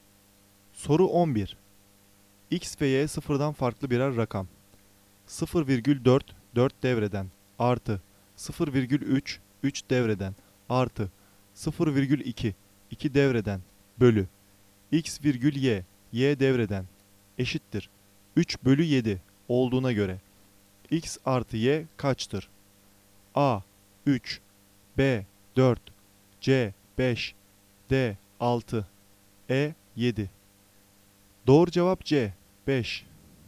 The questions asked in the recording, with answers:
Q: 0,4 4 devreden artı 0,3 3 devreden artı 0,2 2 devreden bölü x virgül y, y devreden eşittir 3 bölü 7 olduğuna göre x artı y kaçtır?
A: Doğru cevap C 5.